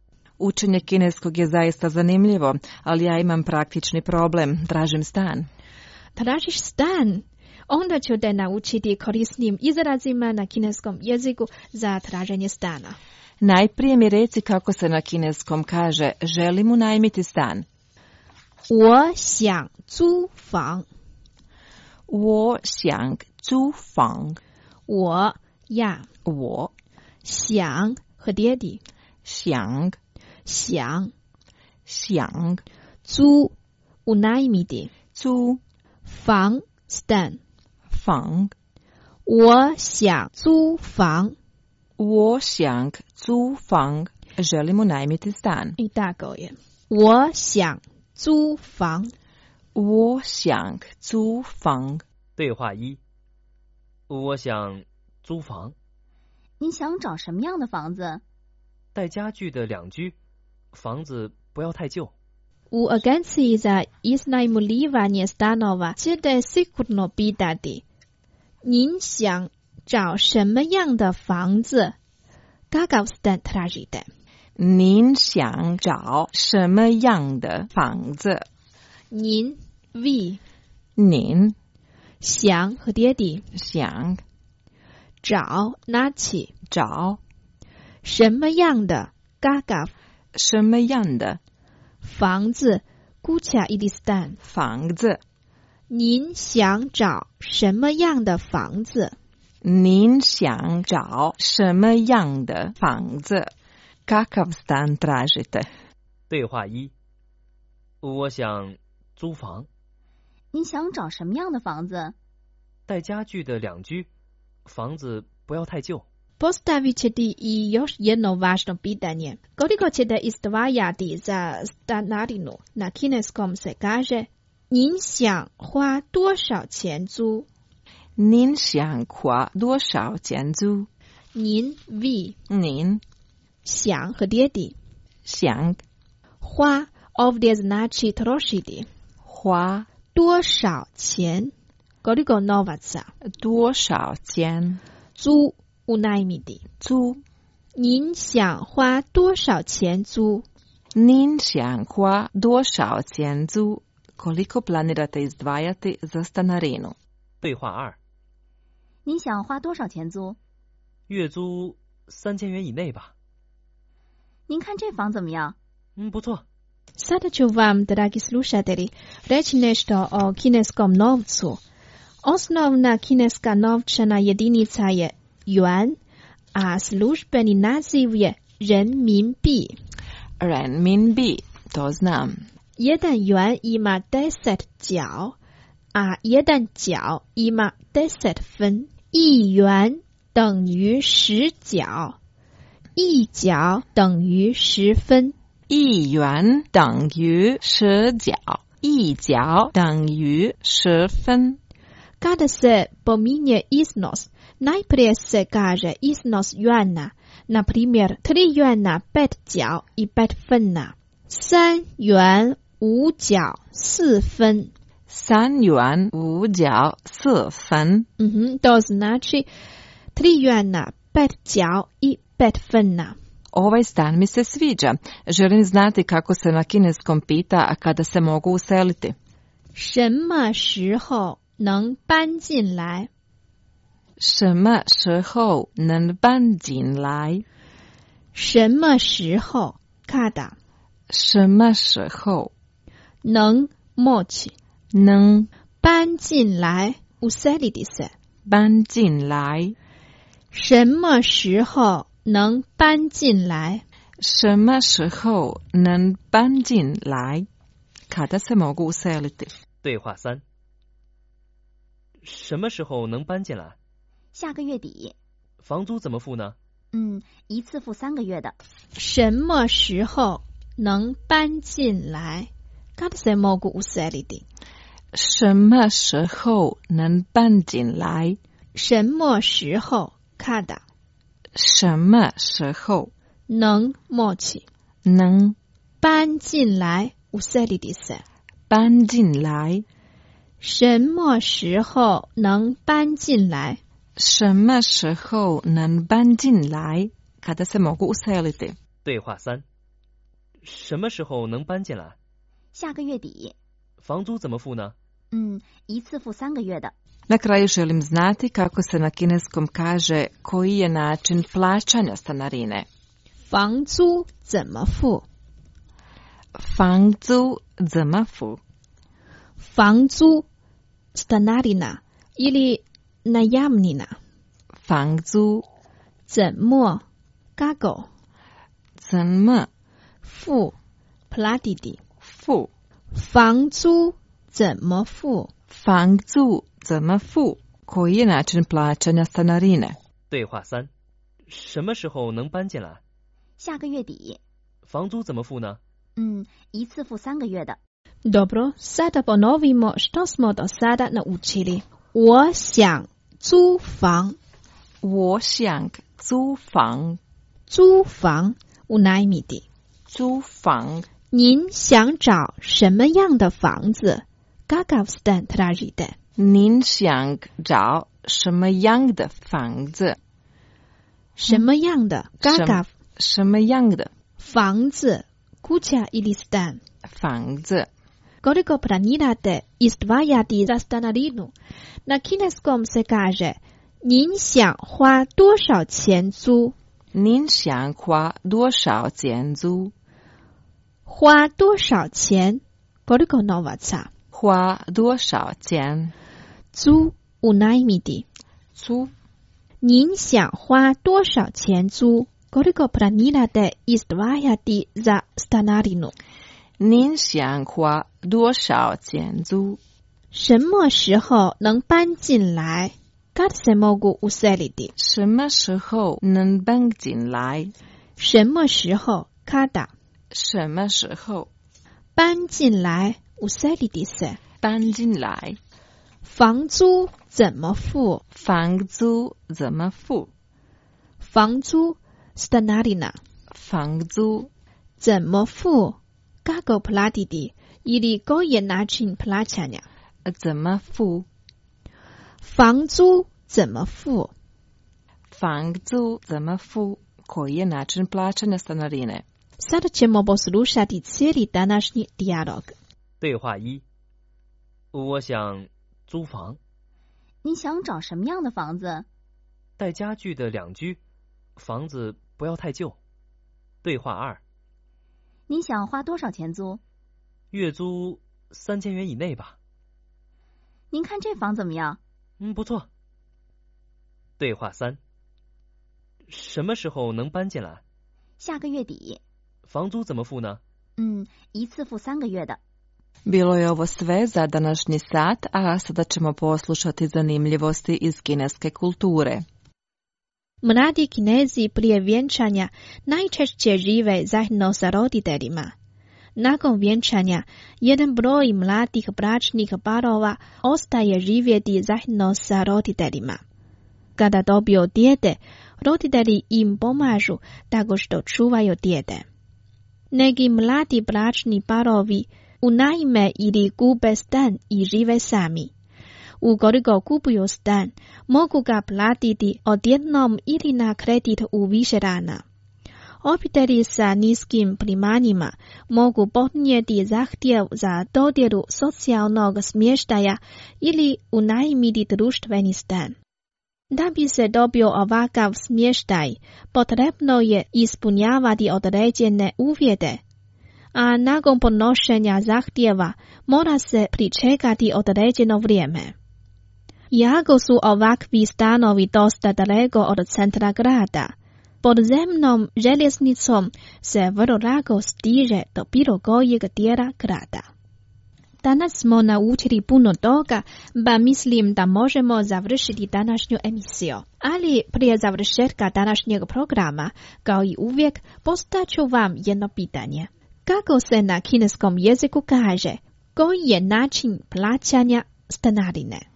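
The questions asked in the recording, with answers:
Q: Kako se na kineskom jeziku kaže, koji je način plaćanja stanarine?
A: 房租怎么付?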